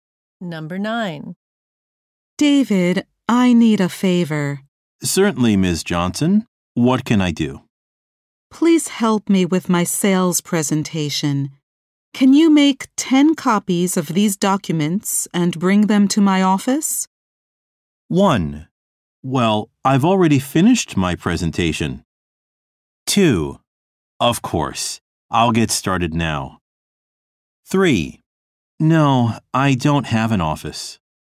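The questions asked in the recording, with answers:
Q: Can you make 10 copies of these documents and bring them to my office?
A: 2: Of course, I'll get started now.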